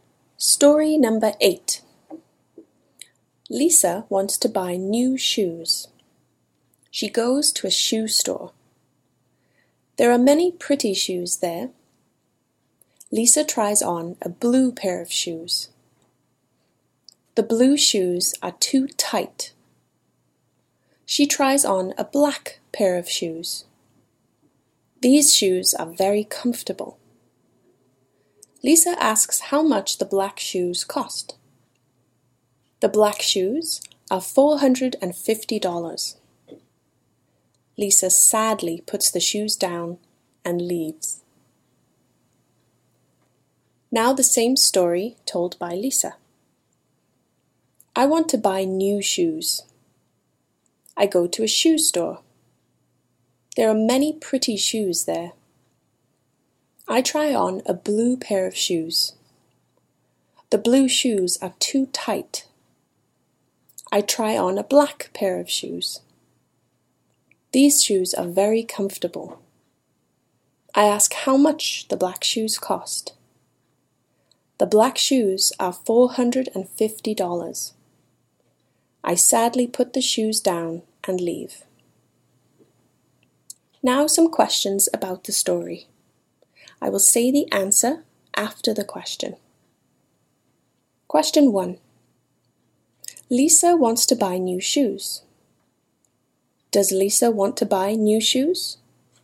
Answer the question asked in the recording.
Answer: Yes. Lisa wants to buy new shoes.